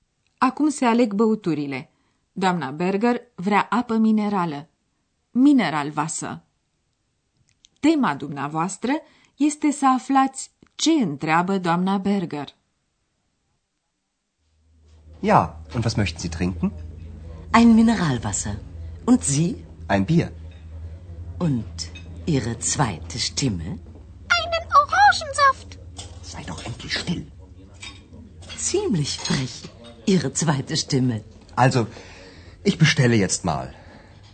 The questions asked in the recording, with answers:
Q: Tema dumneavoastră este să aflați ce întreabă doamna Berger.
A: E, și cea de-a doua voce a dumneavoastră?